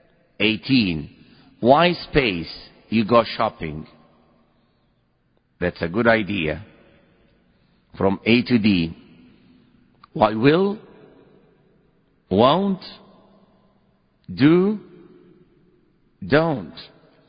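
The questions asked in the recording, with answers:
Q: Why, space, you go shopping?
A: D: don't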